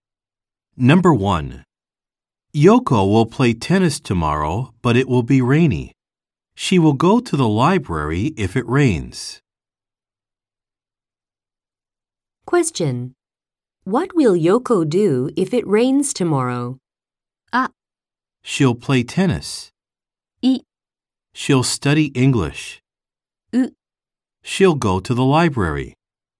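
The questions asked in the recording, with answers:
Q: What will Yoko do if it rains tomorrow?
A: U: She'll go to the library.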